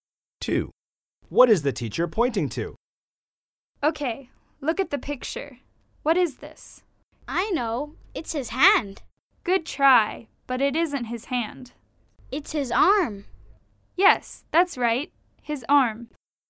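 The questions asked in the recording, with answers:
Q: What is the teacher pointing to?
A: his arm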